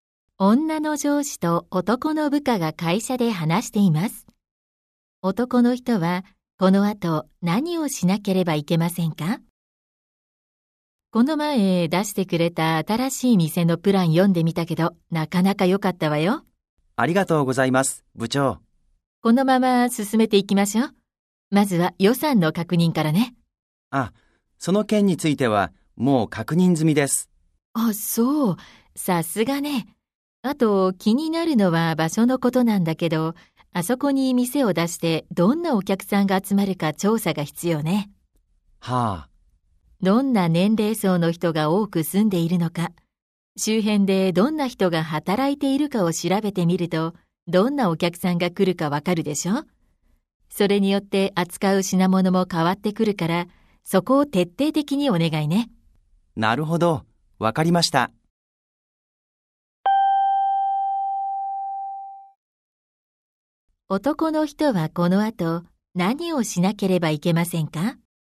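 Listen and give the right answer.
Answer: 店を出す場所の周辺に住む人や働く人を調べ、どんな客が来るか調査する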